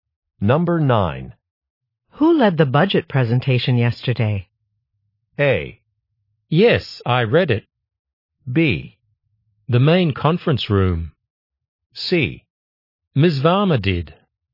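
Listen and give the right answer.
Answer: C: Ms. Varma did.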